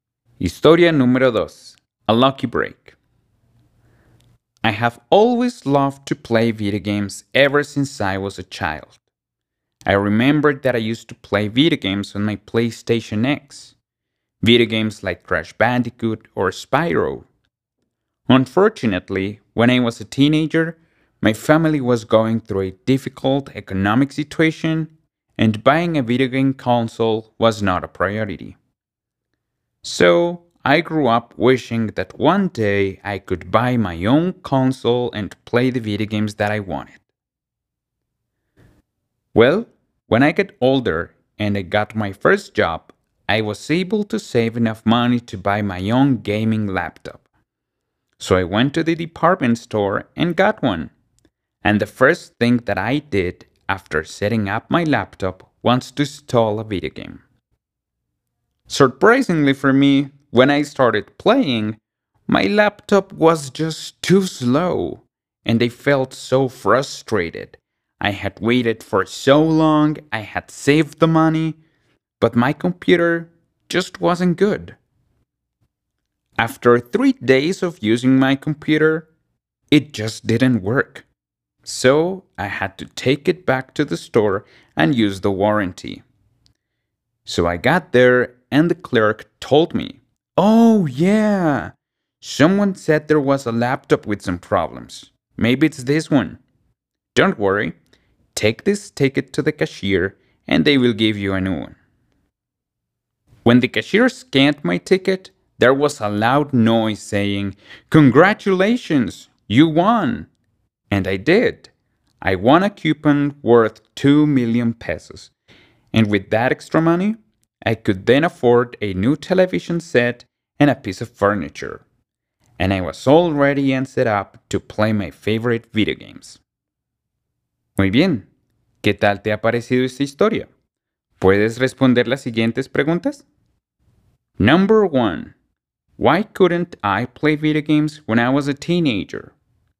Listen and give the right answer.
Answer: Well, because I was going through a difficult economic situation.